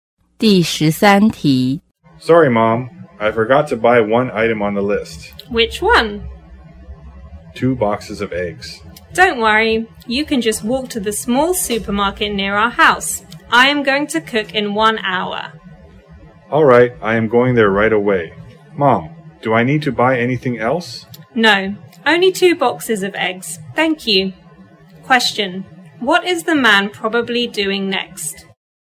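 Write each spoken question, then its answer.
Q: what is the man probably doing next?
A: Walking to the supermarket to buy 2 boxes of eggs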